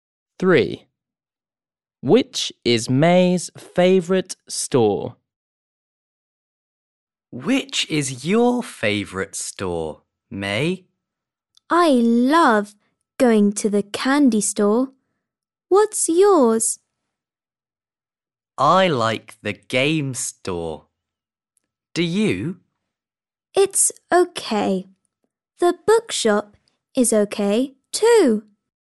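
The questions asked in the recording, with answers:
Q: Which is May's favourite store?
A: the candy store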